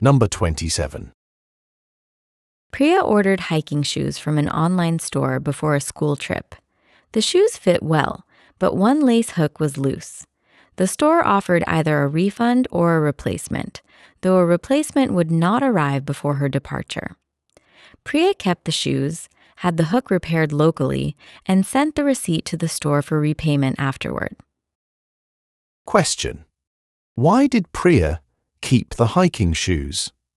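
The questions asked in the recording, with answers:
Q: Why did Priya keep the hiking shoes?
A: They fit well, and a replacement would not arrive before her school trip.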